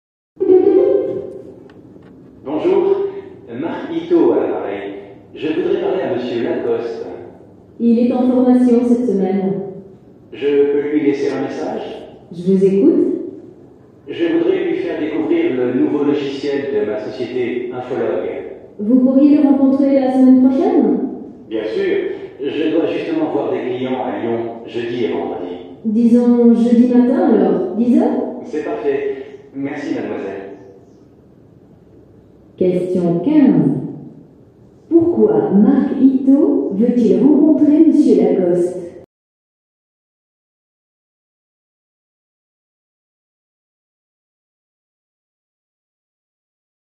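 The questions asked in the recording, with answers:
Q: Pourquoi Marc Ito veut-il rencontrer M.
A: Pour lui faire découvrir le nouveau logiciel de sa société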